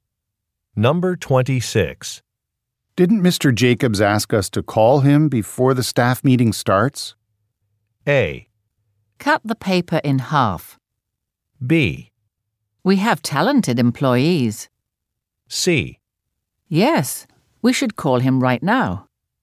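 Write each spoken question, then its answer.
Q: Didn't Mr. Jacobs ask us to call him before the staff meeting starts?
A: C: Yes, we should call him right now.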